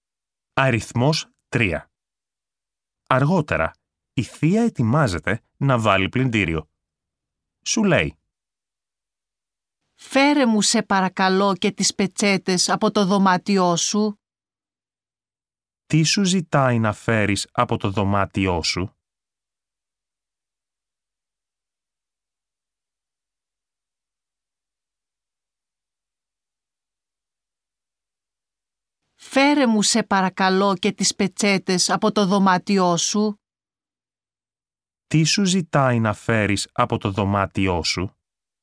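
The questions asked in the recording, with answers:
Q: Τι σου ζητάει να φέρεις από το δωμάτιό σου?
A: Τις πετσέτες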